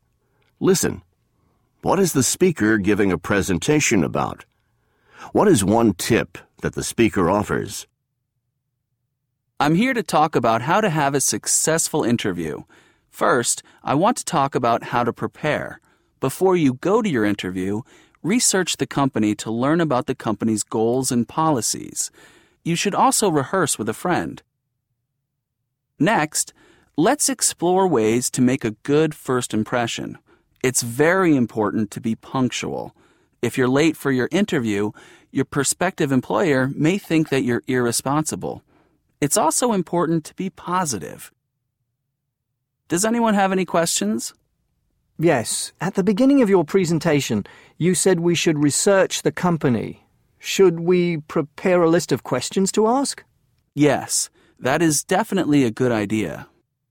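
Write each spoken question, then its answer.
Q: What is the speaker giving a presentation about?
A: How to have a successful interview

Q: What is one tip that the speaker offers?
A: Research the company before the interview (also: rehearse with a friend, be punctual, be positive)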